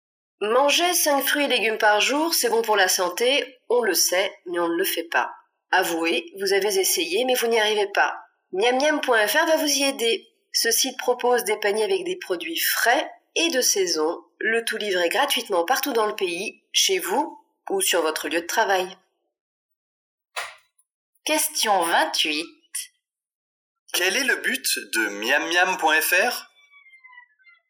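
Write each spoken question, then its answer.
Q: Quel est le but de Miamiam.fr ?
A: Aider à manger 5 fruits et légumes par jour en livrant gratuitement des paniers de produits frais et de saison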